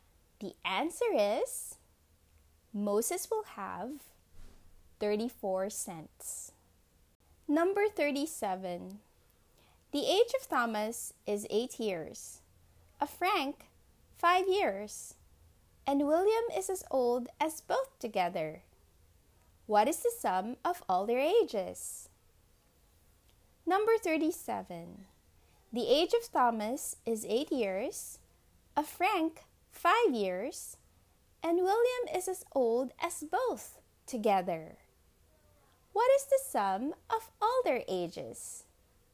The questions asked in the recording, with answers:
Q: What is the sum of all their ages?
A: The answer is 26 years altogether.